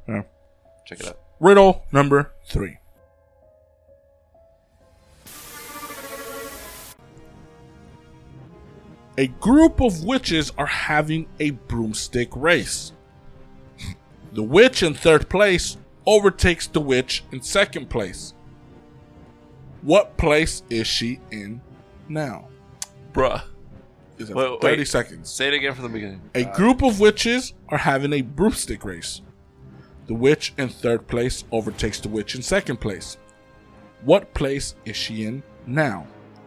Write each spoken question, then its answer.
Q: What place is she in now?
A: Correct. She's in second place.